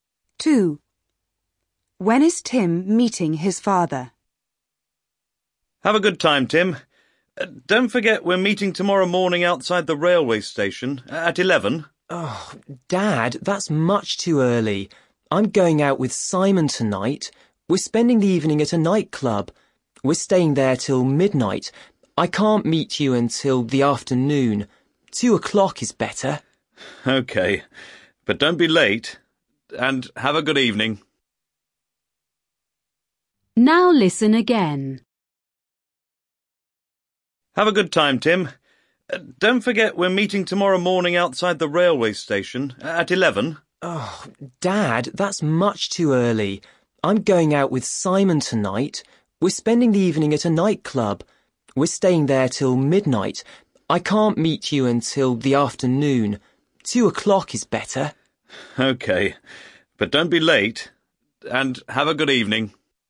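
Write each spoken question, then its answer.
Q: When is Tim meeting his father?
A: At 2 o'clock tomorrow afternoon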